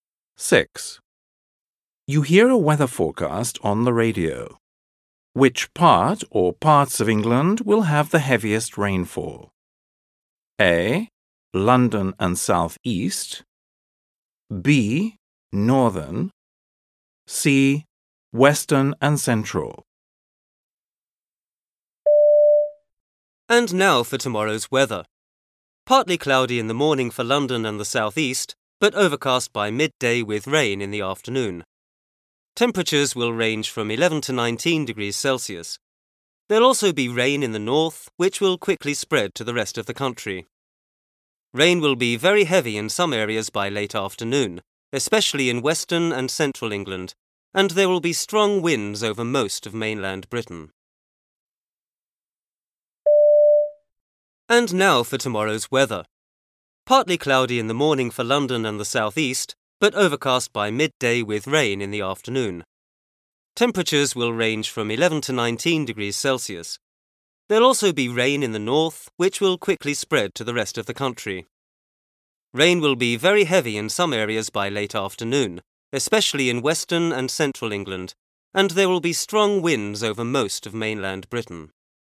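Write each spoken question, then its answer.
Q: Which part or parts of England will have the heaviest rainfall?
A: C: Western and Central.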